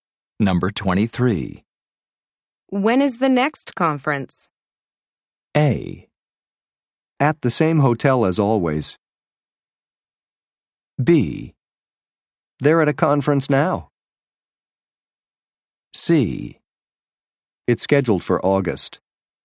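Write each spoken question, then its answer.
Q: When is the next conference?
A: C: It's scheduled for August.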